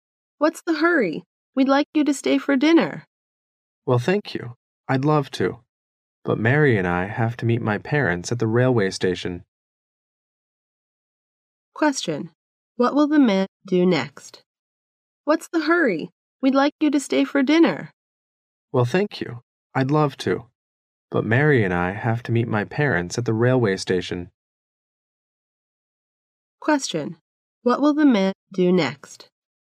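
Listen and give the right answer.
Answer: Go to the railway station to meet his parents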